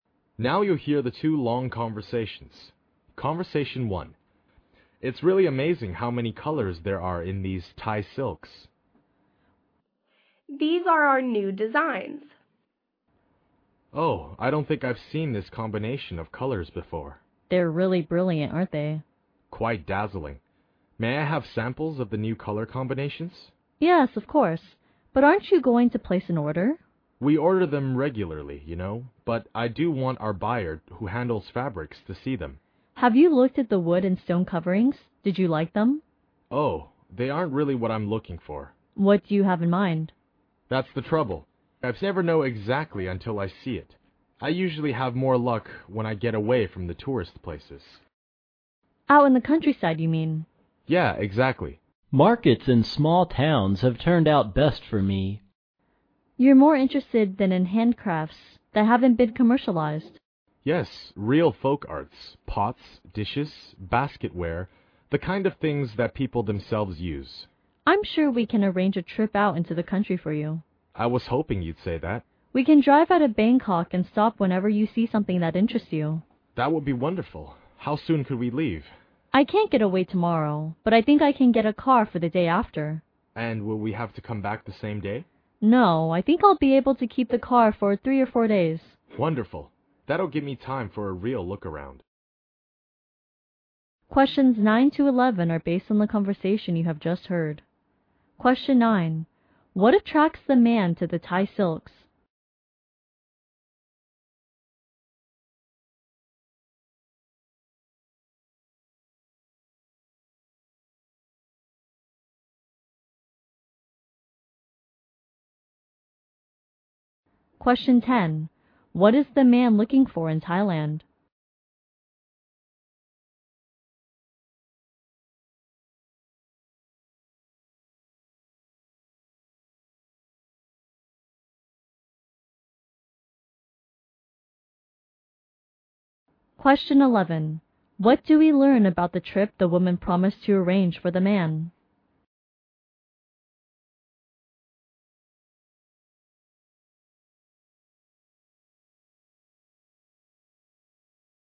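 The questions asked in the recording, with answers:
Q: What attracts the man to the Thai silks?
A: Their brilliant new color combinations.

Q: What is the man looking for in Thailand?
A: Non-commercialized folk handcrafts.

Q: What do we learn about the trip the woman promised to arrange for the man?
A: They will drive into the countryside the day after tomorrow for 3 or 4 days.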